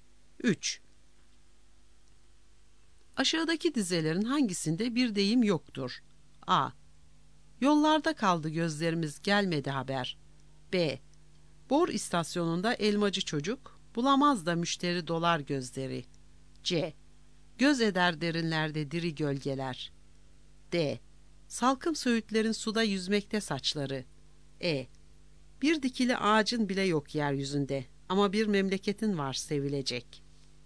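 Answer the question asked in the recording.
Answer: D: Salkım söğütlerin suda yüzmekte saçları.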